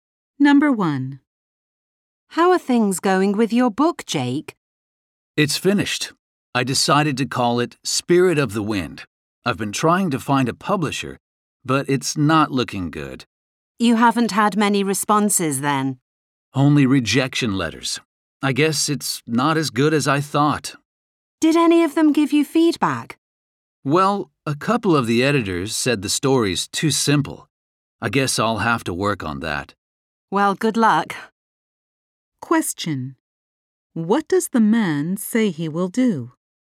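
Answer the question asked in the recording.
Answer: Work on making his story less simple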